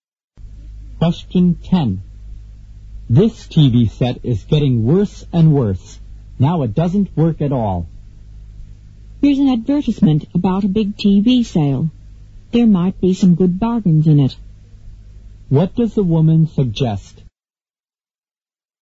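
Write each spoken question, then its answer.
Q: What does the woman suggest?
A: Buying a new TV set at the sale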